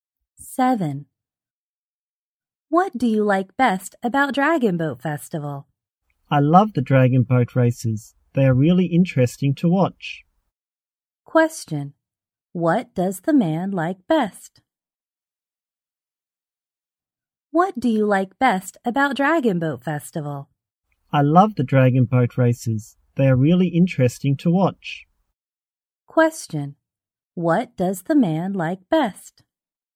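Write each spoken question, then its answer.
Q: What does the man like best?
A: The dragon boat races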